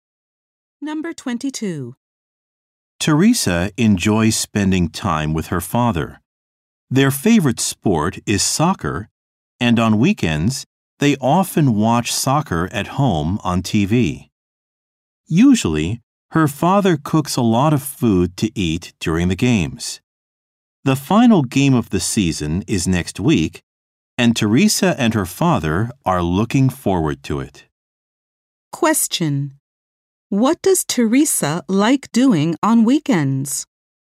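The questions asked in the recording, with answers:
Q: What does Teresa like doing on weekends?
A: Watching soccer on TV with her father.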